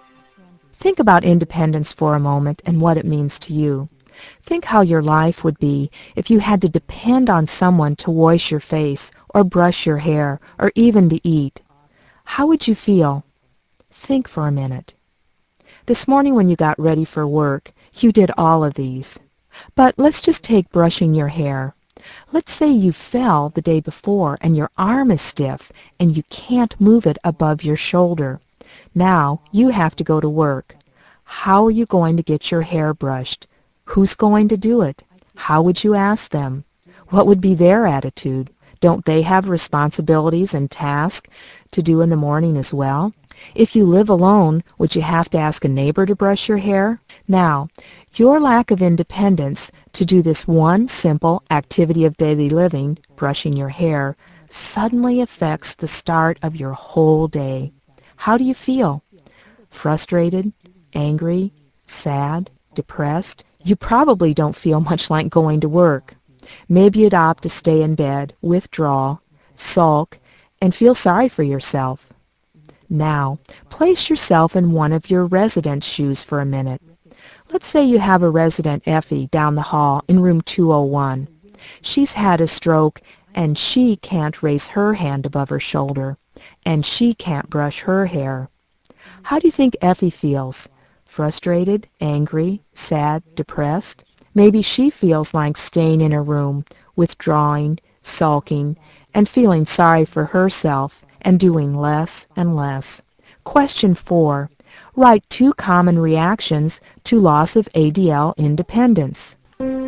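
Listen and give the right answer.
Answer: Frustration and anger (also sadness, depression, withdrawal)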